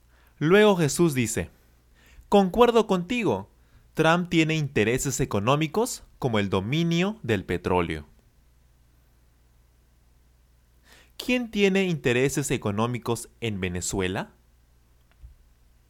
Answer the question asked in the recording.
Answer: Donald Trump.